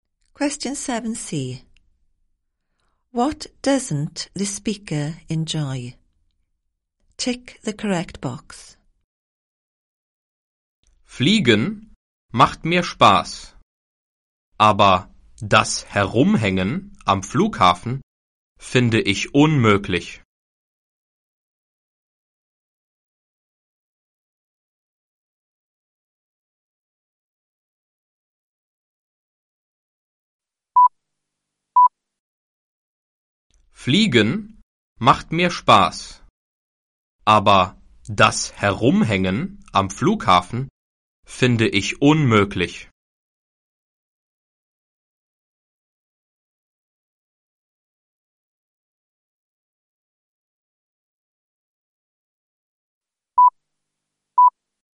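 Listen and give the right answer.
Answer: Hanging around at the airport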